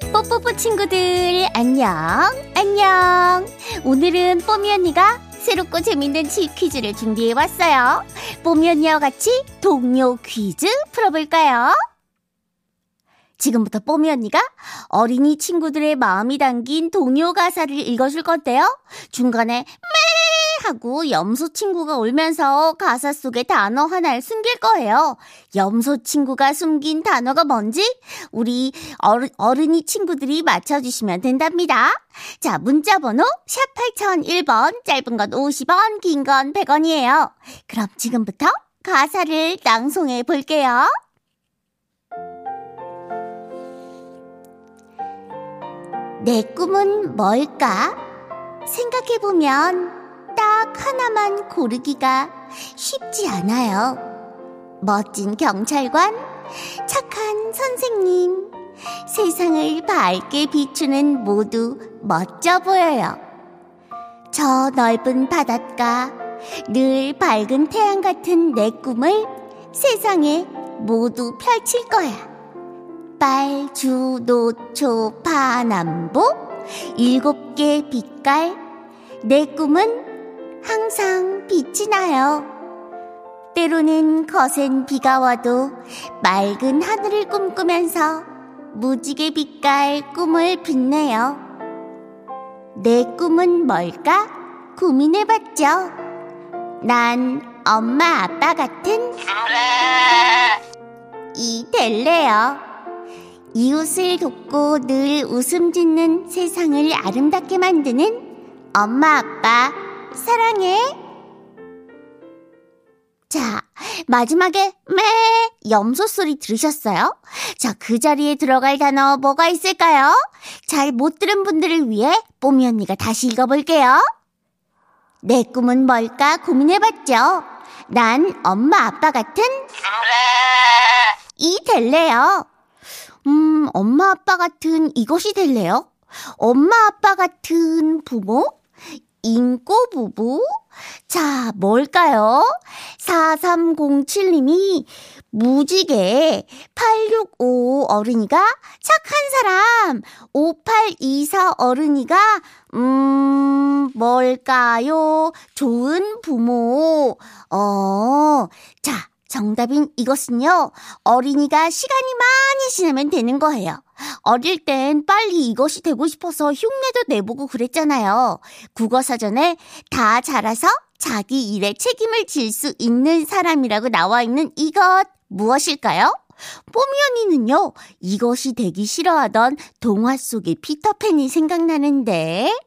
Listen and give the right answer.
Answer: 정답은 어른이었습니다.